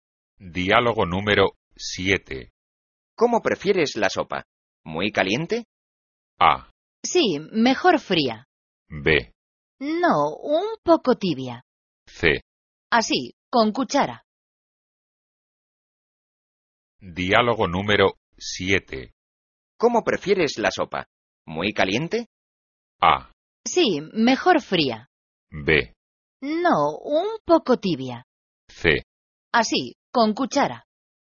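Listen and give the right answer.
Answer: B: No, un poco tibia.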